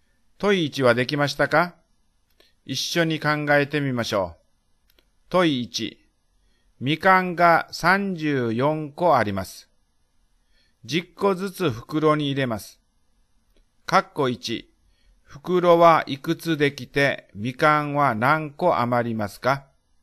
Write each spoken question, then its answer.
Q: 括弧1、袋はいくつできてみかんは何個余りますか?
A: すると、3余り4です。2袋、3袋できて4個余るのです。